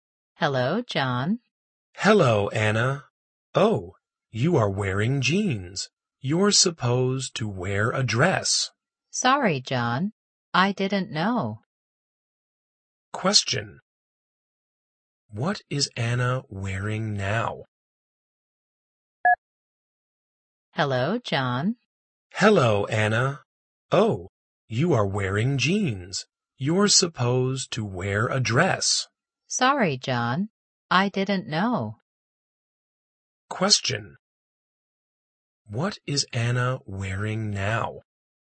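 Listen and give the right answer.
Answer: Jeans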